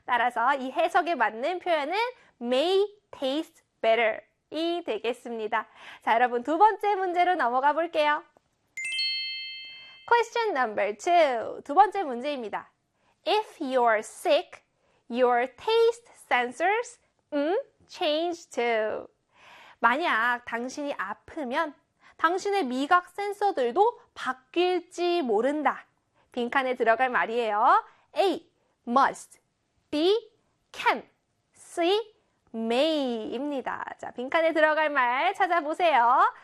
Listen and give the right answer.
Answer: C의 may였습니다.